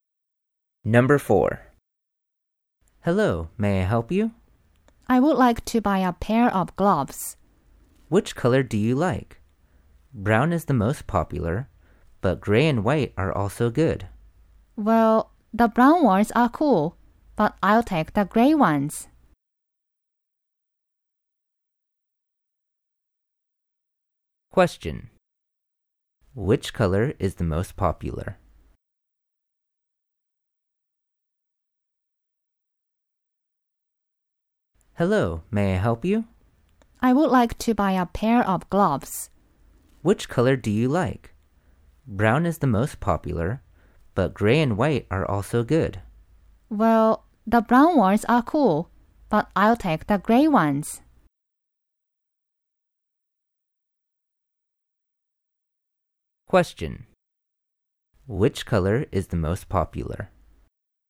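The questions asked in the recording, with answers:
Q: Which color is the most popular?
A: Brown.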